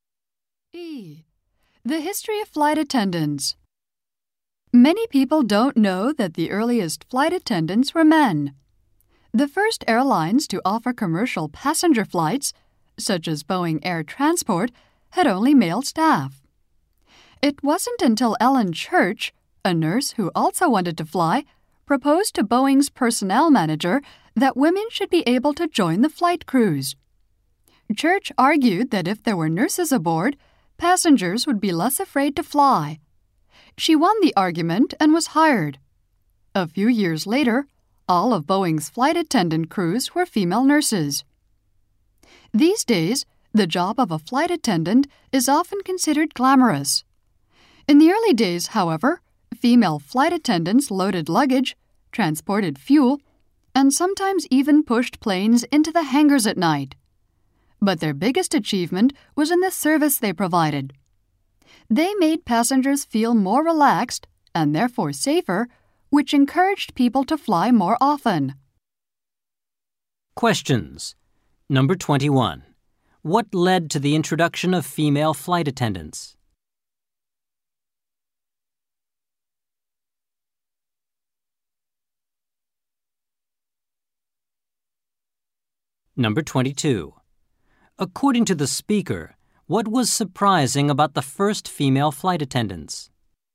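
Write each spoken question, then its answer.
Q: What led to the introduction of female flight attendants?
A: Ellen Church argued that nurses on board would make passengers less afraid to fly.

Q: According to the speaker, what was surprising about the first female flight attendants?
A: They did physical work like loading luggage, carrying fuel and pushing planes.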